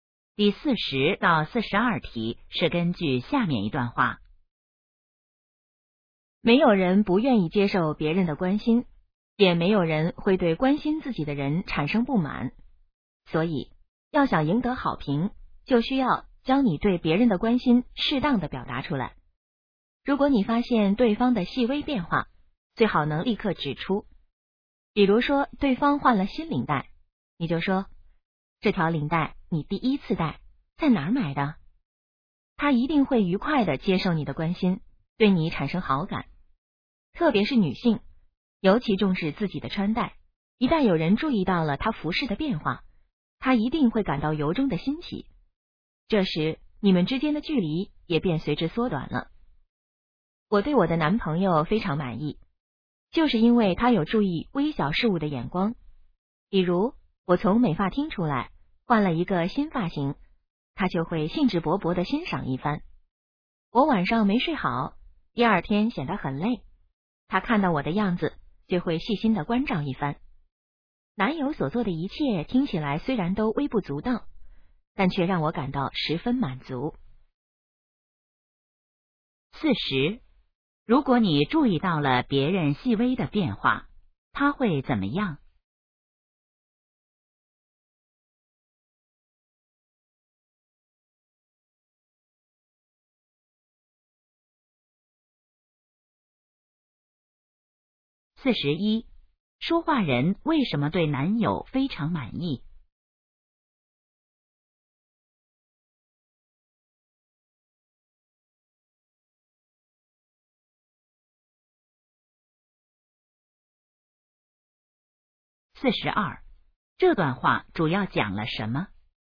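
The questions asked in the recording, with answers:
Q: 如果你注意到了别人细微的变化,他会怎么样?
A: 愉快地接受你的关心,对你产生好感

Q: 说话人为什么对男友非常满意?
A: 他能注意到微小的事物

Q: 这段话主要讲了什么?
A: 要适当表达对别人的关心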